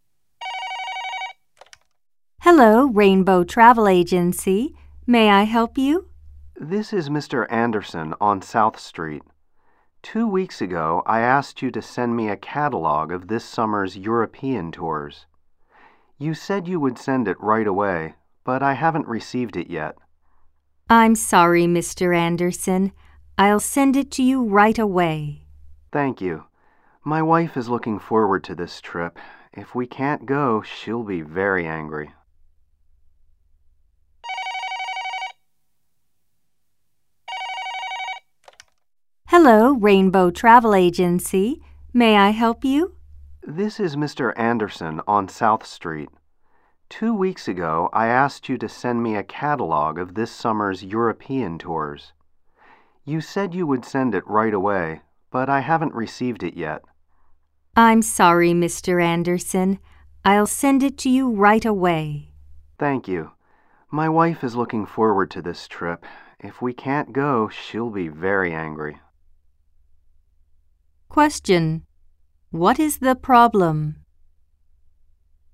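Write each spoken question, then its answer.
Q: What is the problem?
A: Mr. Anderson hasn't received the catalog of European tours he asked for two weeks ago.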